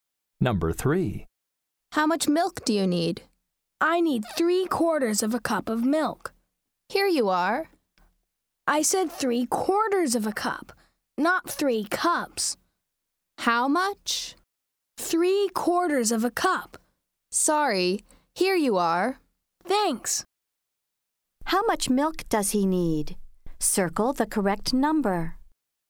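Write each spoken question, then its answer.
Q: How much milk does he need?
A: 3/4 of a cup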